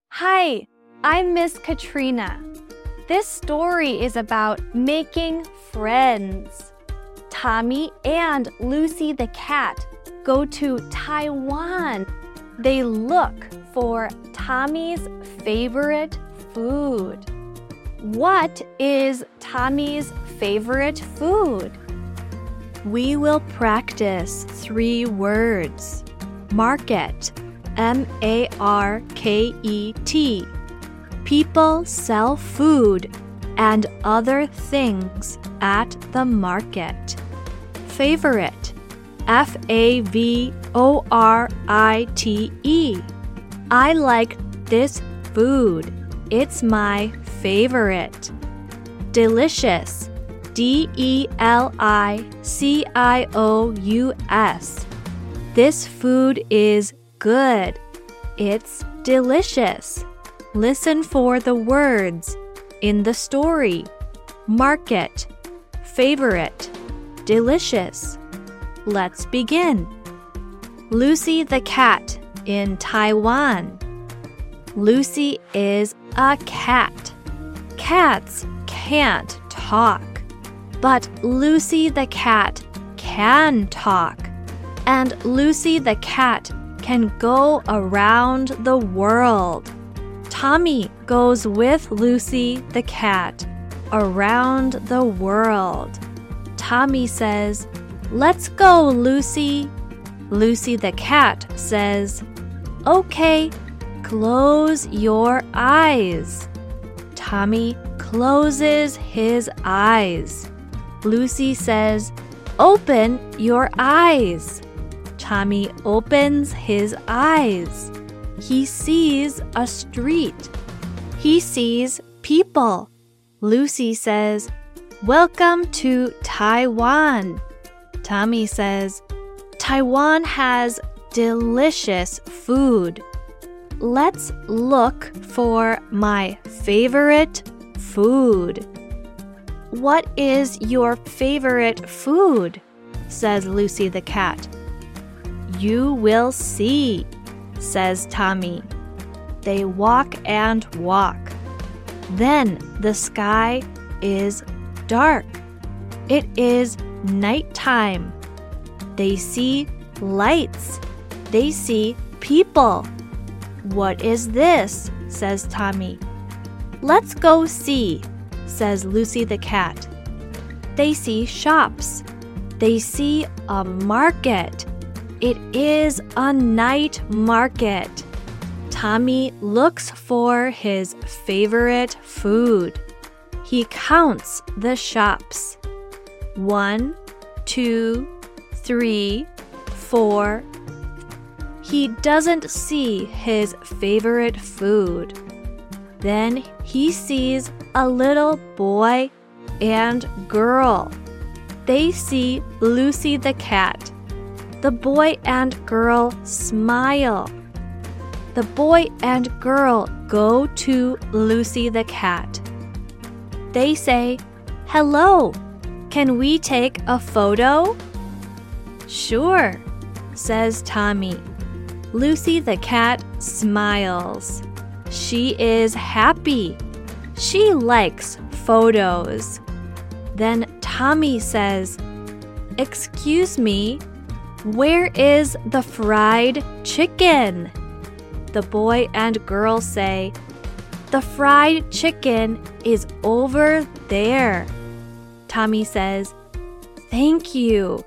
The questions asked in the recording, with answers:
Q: What is Tommy's favorite food?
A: Fried chicken is my favorite food.